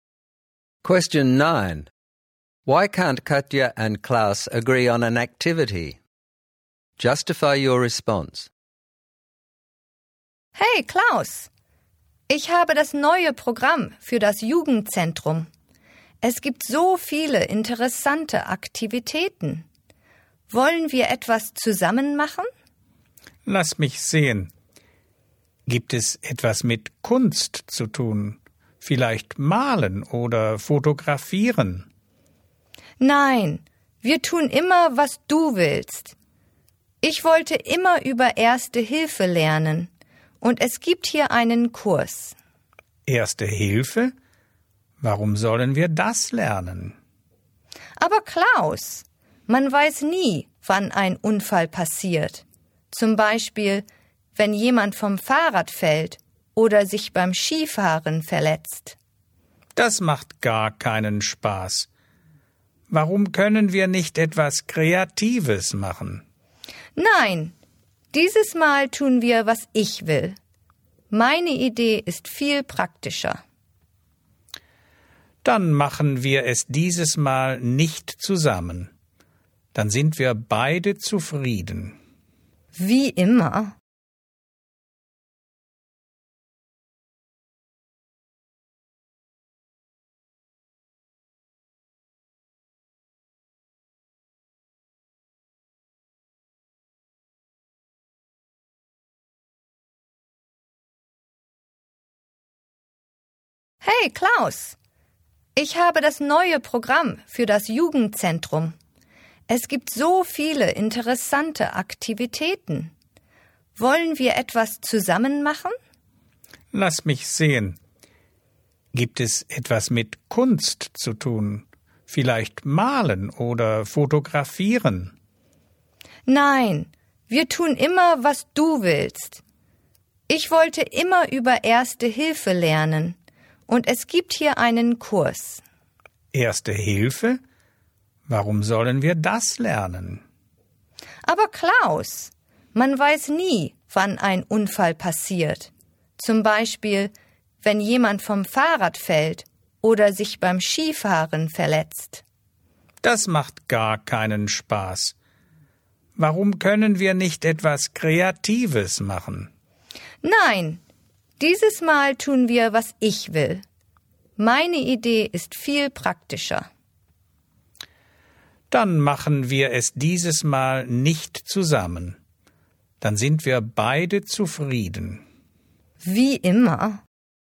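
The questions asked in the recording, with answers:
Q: Why can't Katya and Klaus agree on an activity?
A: Klaus wants something artistic or creative (painting, photography), but Katya wants a first-aid course and says they always do what he wants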